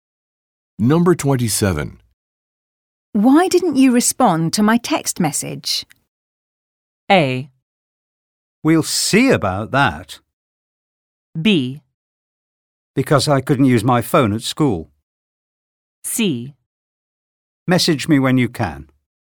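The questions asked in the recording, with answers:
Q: Why didn't you respond to my text message?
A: B: Because I couldn't use my phone at school.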